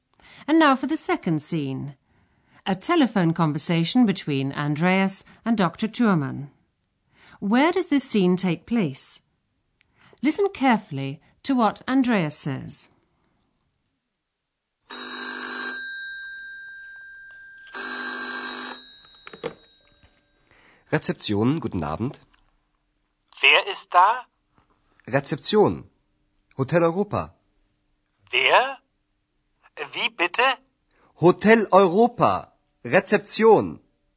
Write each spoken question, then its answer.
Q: Where does this scene take place?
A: Andreas is in a hotel. He picks up the phone and says, Rezeption.